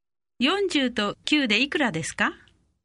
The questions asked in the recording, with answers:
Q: 40と9でいくらですか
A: 49 49